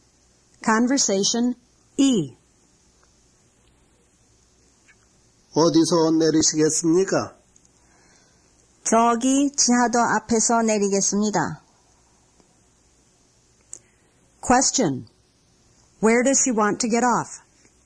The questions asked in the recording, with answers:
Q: Where does she want to get off?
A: She wants to get off in front of the underpass.